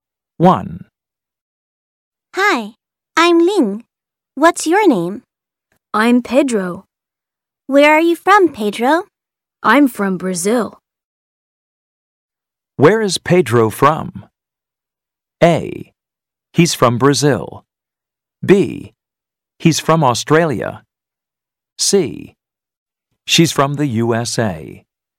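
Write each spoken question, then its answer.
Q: Where is Pedro from?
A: A: He's from Brazil.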